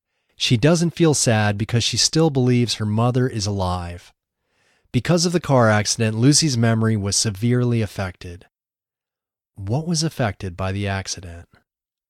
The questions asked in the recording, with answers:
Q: What was affected by the accident?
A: Lucy's memory was severely affected by the accident.